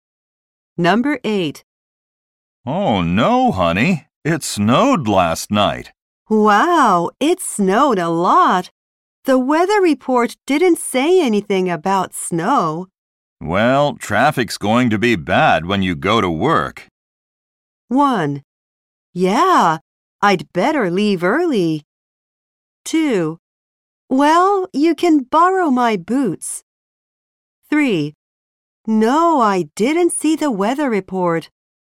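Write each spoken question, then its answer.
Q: Well, traffic's going to be bad when you go to work.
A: 1: Yeah, I'd better leave early.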